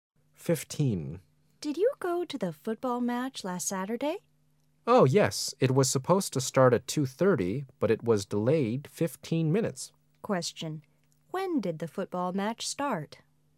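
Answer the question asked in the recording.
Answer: 2:45

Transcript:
[解析] W: Did you go to the football match last Saturday? M: Oh yes. It was supposed to start at 2:30, but it was delayed 15 minutes. Q: When did the football match start?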